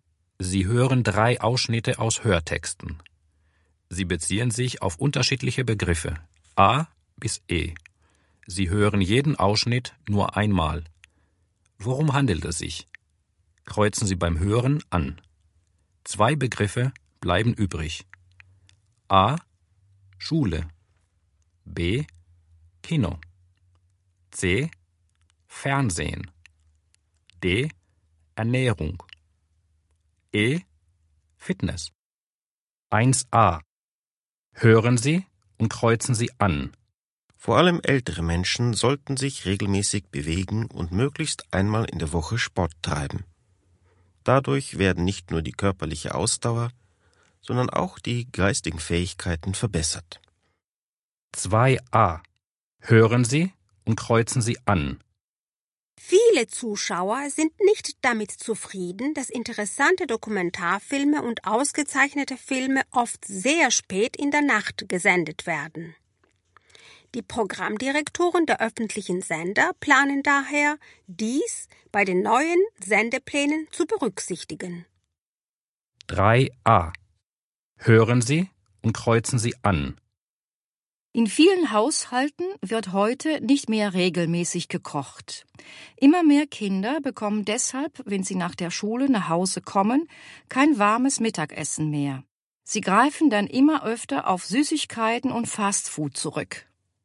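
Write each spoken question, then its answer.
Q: Worum handelt es sich?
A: E: Fitness

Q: Worum handelt es sich?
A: C: Fernsehen

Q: Worum handelt es sich?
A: D: Ernährung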